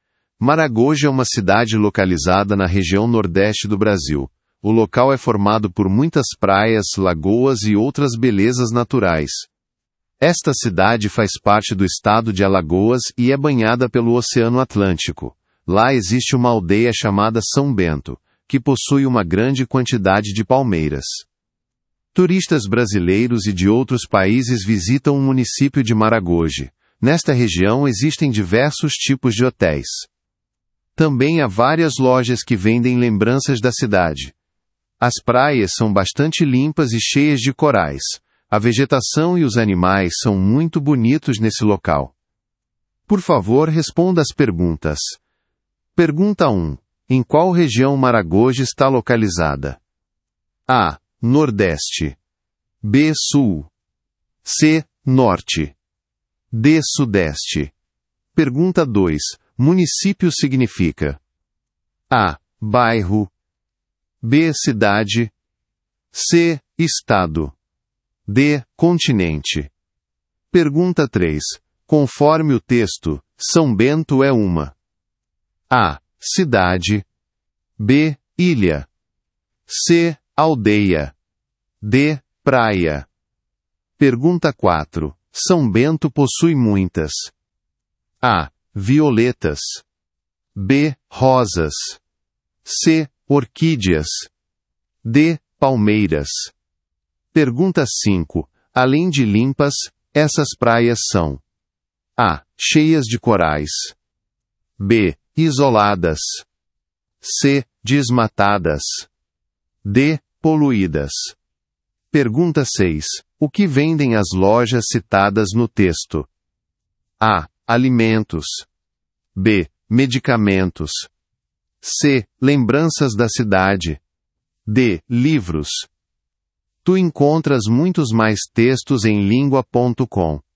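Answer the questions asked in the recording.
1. A: Nordeste
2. B: Cidade
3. C: Aldeia
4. D: Palmeiras
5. A: Cheias de corais
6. C: Lembranças da cidade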